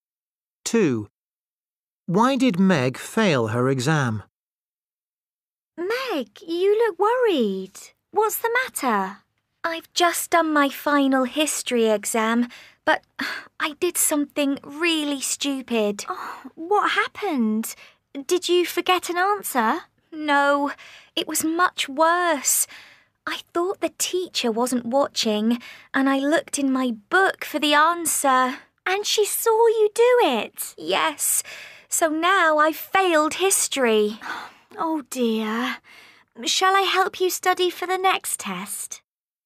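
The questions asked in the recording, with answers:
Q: Why did Meg fail her exam?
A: She looked in her book for the answer and the teacher saw her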